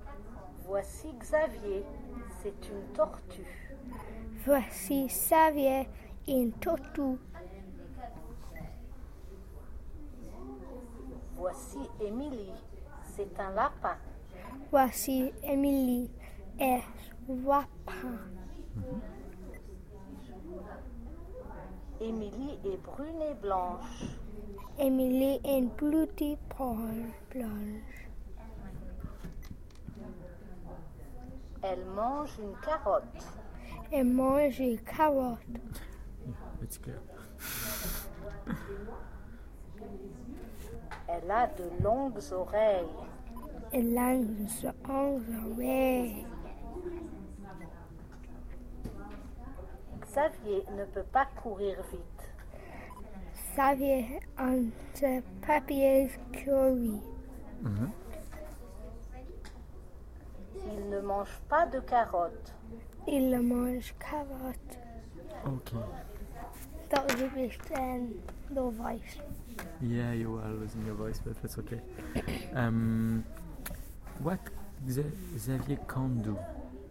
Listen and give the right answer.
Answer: He can't run.